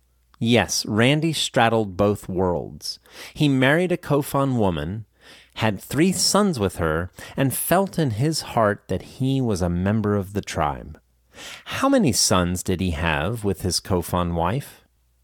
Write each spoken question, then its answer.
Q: How many sons did he have with his Kofun wife?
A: He had three sons with her.